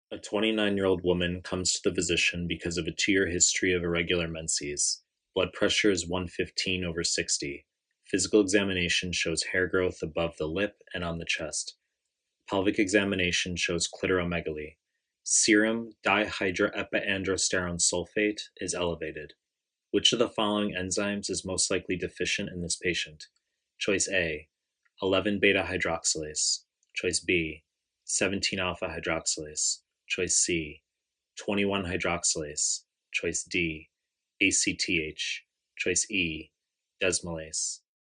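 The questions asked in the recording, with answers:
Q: Which of the following enzymes is most likely deficient in this patient?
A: C: 21 hydroxylase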